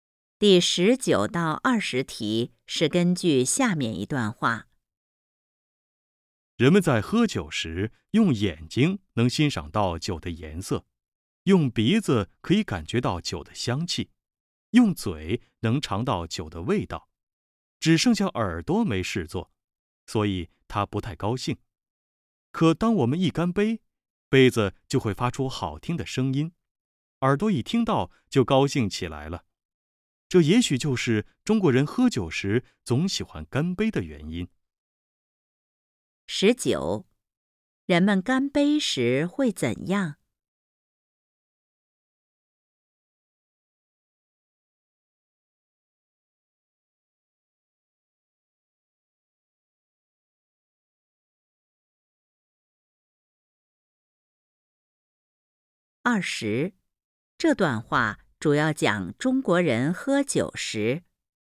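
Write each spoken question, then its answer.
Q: 人们干杯时会怎样?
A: 杯子发出好听的声音,耳朵高兴起来

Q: 这段话主要讲中国人喝酒时。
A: 为什么喜欢干杯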